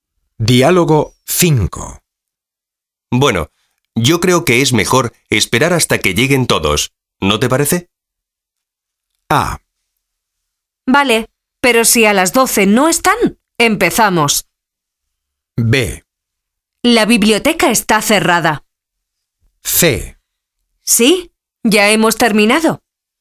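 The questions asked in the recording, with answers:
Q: Bueno, yo creo que es mejor esperar hasta que lleguen todos, ¿no te parece?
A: A: Vale, pero si a las 12 no están, empezamos.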